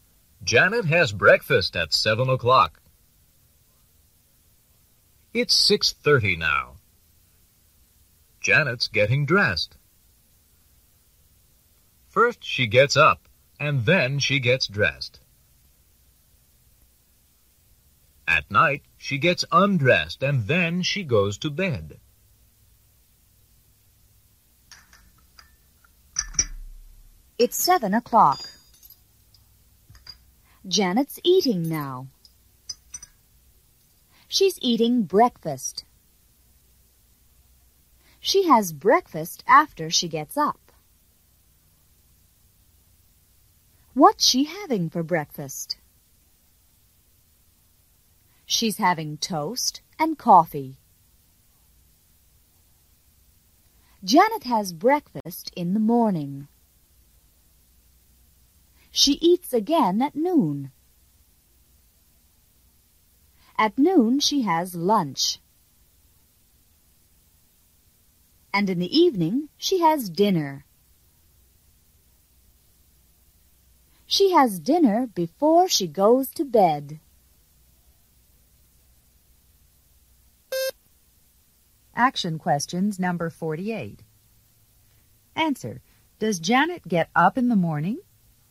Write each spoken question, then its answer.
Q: does Janet get up in the morning?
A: Yes, she does.